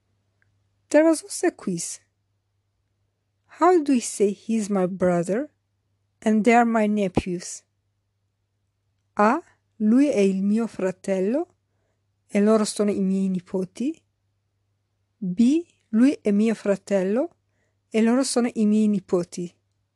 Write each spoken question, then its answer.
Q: How do we say he is my brother and they are my nephews?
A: The correct answer is B. Lui è mio fratello e loro sono i miei nipoti.